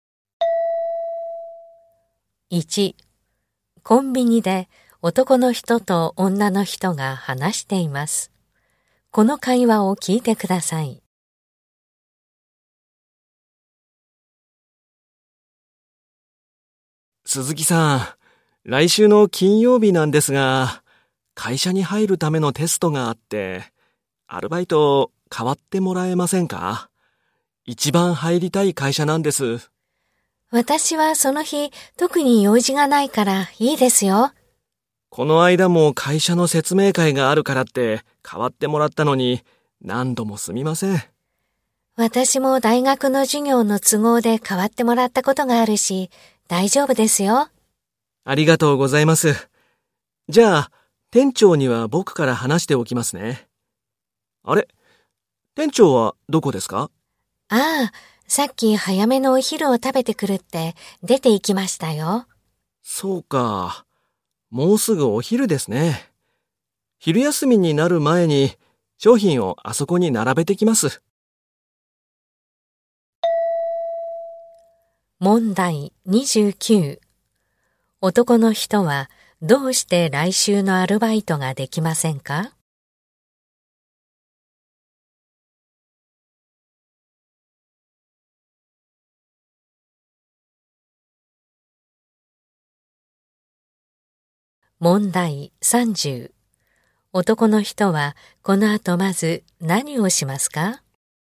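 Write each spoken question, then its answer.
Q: 男の人はどうして来週のアルバイトができませんか?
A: 会社に入るためのテストがあるから

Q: 男の人はこの後まず何をしますか?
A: 商品を並べる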